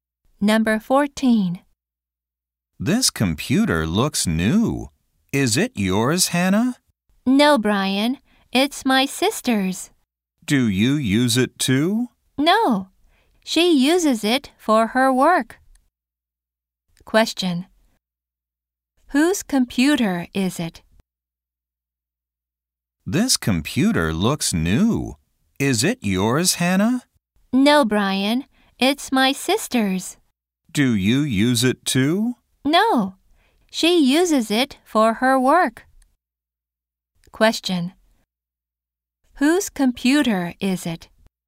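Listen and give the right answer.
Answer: Hannah's sister's.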